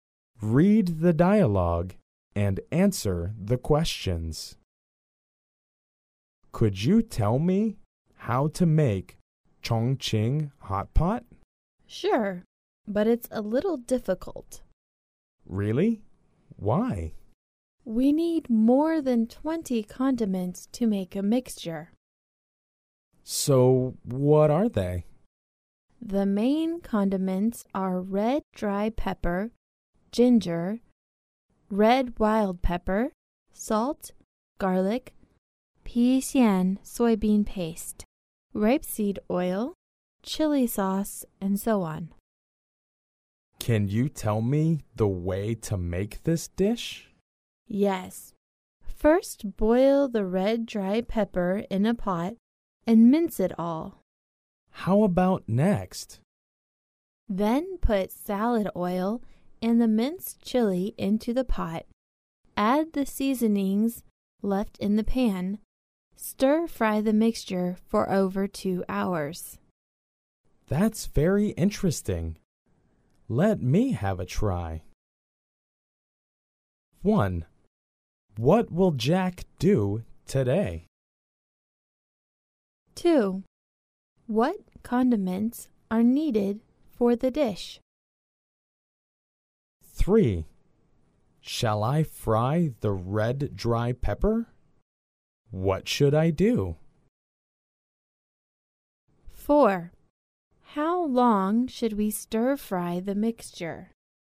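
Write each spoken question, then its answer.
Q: What condiments are needed for the dish?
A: Red dry pepper, ginger, red wild pepper, salt, garlic, pea xian soybean paste, rapeseed oil, chili sauce, and so on

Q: Shall I fry the red dry pepper? What should I do?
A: No, boil the red dry pepper in a pot and mince it all

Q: How long should we stir fry the mixture?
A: For over 2 hours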